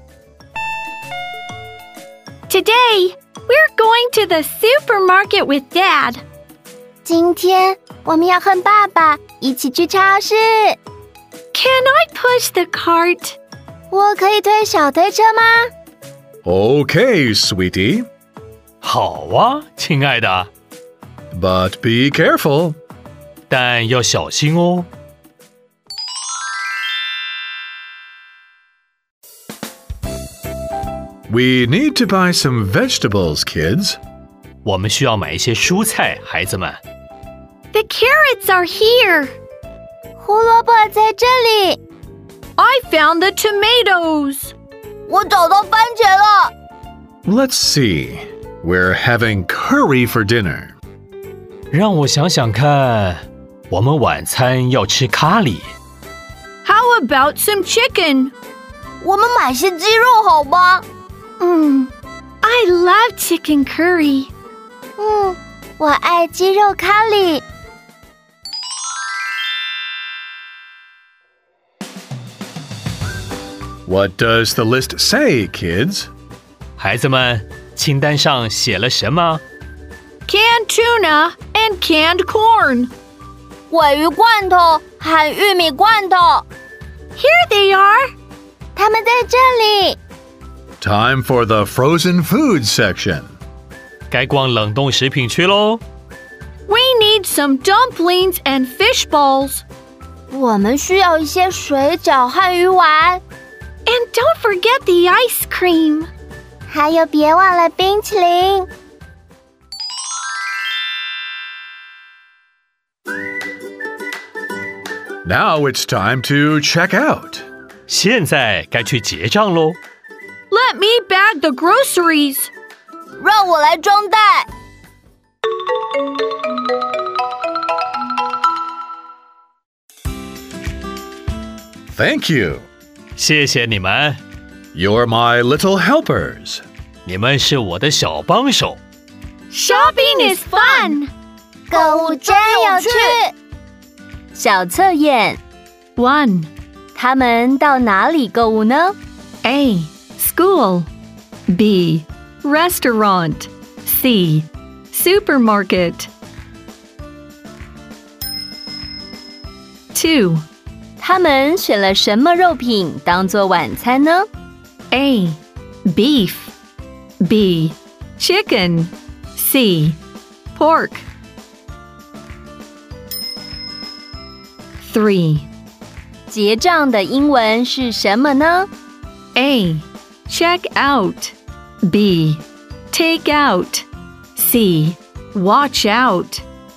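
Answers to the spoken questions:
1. C: Supermarket
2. B: Chicken
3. A: Check out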